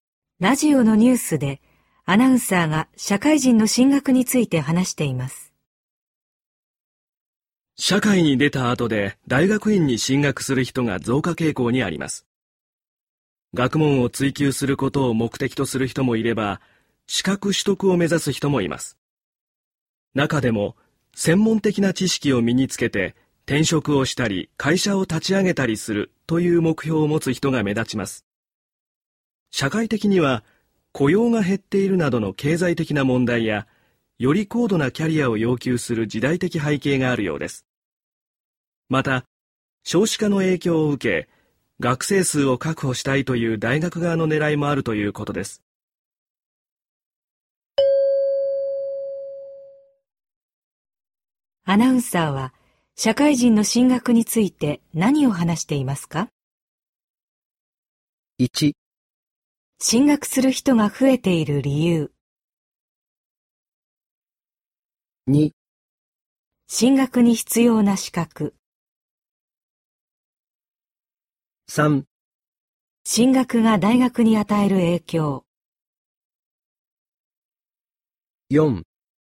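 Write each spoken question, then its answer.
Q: アナウンサーは、社会人の進学について何を話していますか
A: 1: 進学する人が増えている理由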